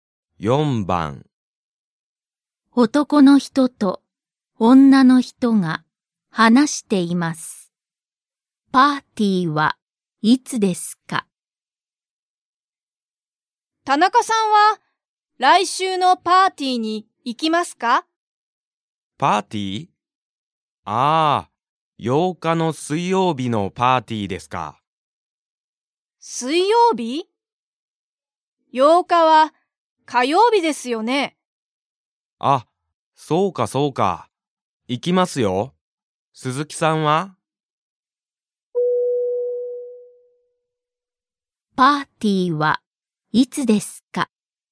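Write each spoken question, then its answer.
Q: パーティーはいつですか?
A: 8日の火曜日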